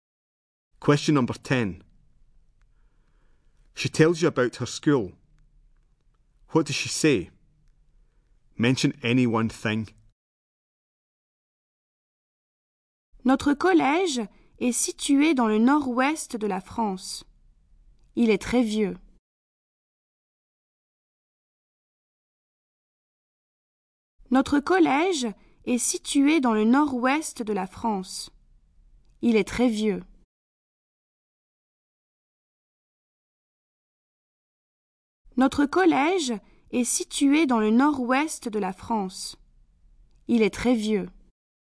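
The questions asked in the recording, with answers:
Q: What does she say? Mention any one thing.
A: Her school is in north-west France; it is very old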